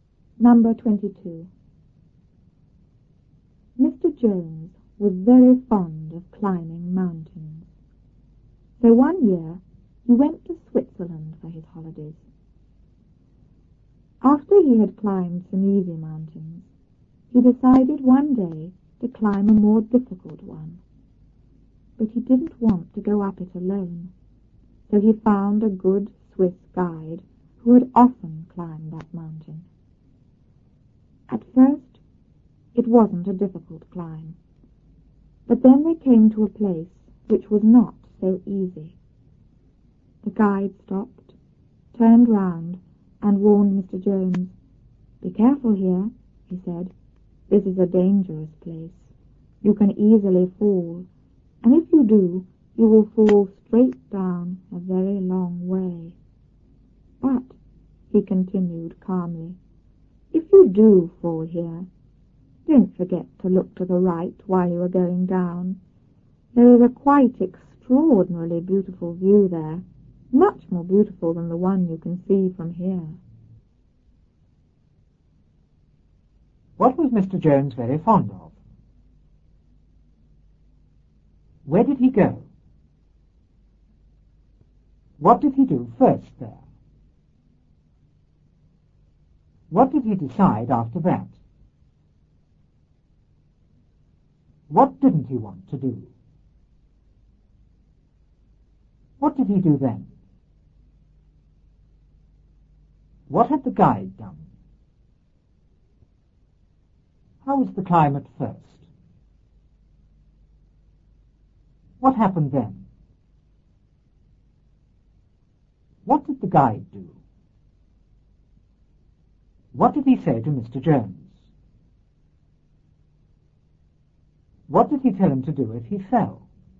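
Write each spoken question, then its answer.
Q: What was Mr. Jones very fond of?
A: Climbing mountains

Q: Where did he go?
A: To Switzerland for his holidays

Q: What did he do first there?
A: He climbed some easy mountains

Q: What did he decide after that?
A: To climb a more difficult mountain

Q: What didn't he want to do?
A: Go up it alone

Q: What did he do then?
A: He found a good Swiss guide

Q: What had the guide done?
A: He had often climbed that mountain

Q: How was the climb at first?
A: It wasn't difficult

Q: What happened then?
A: They came to a place which was not so easy

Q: What did the guide do?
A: He stopped, turned round and warned Mr. Jones

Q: What did he say to Mr. Jones?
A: Be careful, this is a dangerous place

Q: What did he tell him to do if he fell?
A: Look to the right at the beautiful view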